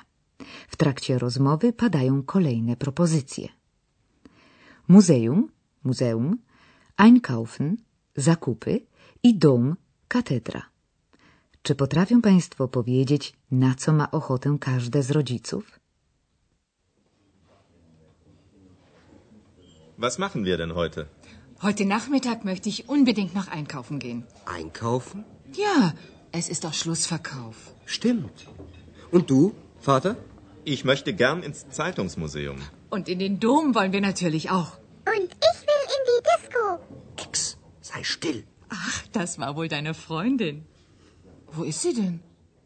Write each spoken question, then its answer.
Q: Czy potrafią Państwo powiedzieć, na co ma ochotę każde z rodziców?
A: A zatem pani Szejwa najchętniej udałaby się na zakupy w ramach trwającej właśnie posezonowej wyprzedaży odzieży. Jej mężowi zaś największą przyjemność sprawiłoby odwiedzenie Muzeum Prasy, które mieści się właśnie w Aachen.